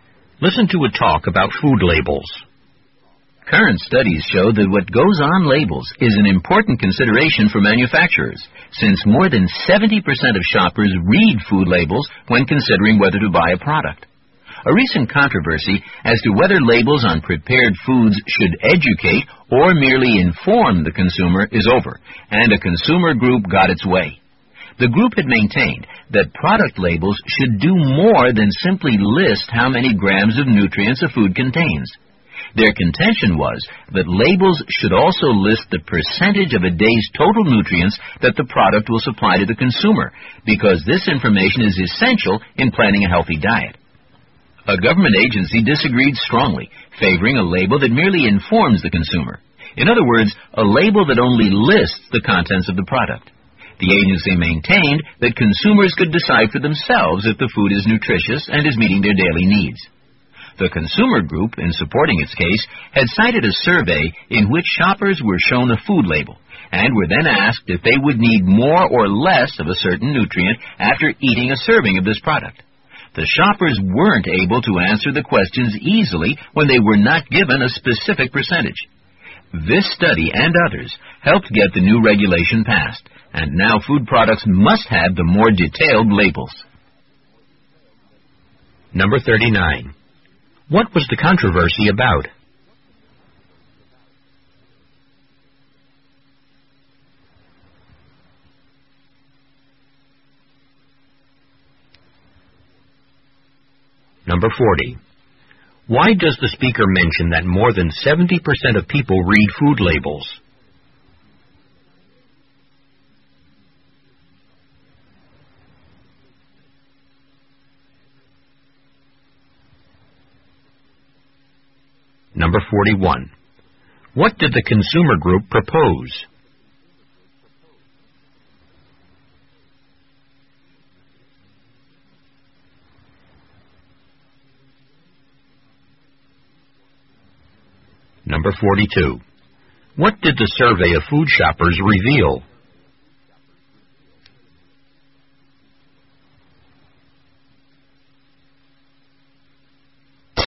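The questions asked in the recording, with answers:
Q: What was the controversy about?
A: Whether food labels should educate or merely inform consumers

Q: Why does the speaker mention that more than 70% of people read food labels?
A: To show that what goes on labels is important to manufacturers

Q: What did the consumer group propose?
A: That labels also list the percentage of a day's total nutrients the product supplies

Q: What did the survey of food shoppers reveal?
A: Shoppers couldn't easily tell if they needed more or less of a nutrient without a specific percentage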